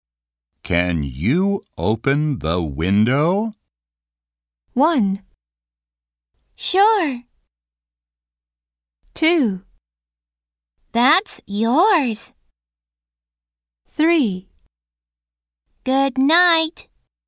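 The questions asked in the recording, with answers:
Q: Can you open the window?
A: 1: Sure.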